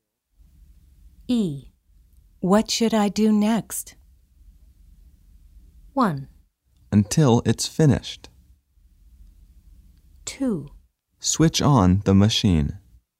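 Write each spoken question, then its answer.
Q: What should I do next?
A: 2: Switch on the machine.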